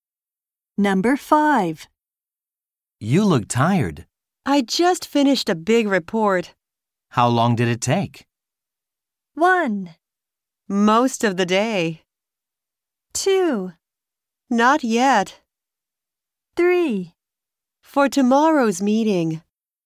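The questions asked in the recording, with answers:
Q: How long did it take?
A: 1: Most of the day.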